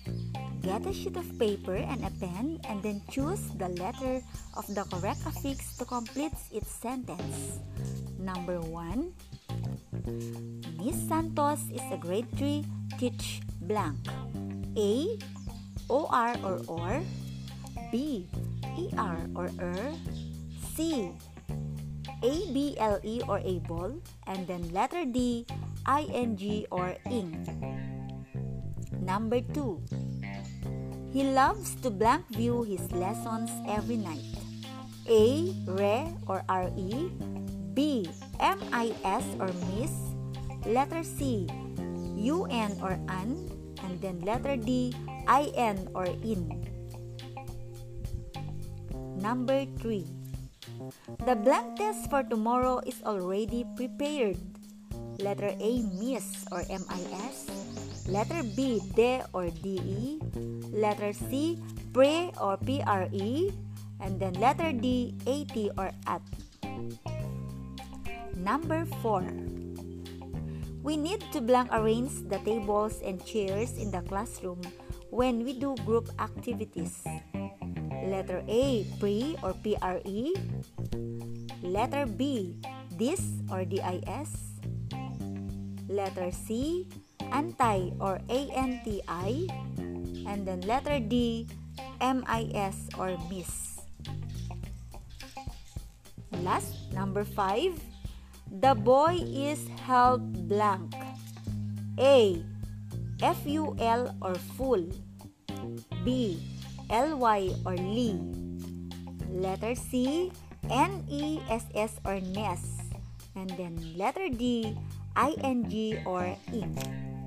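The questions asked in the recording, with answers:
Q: Miss Santos is a grade 3 teach blank.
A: B: E-R or ER

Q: He loves to blank view his lessons every night.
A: A: Re or R-E

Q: The blank test for tomorrow is already prepared.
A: C: pre or pre

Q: The boy is held blank.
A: A: ful or full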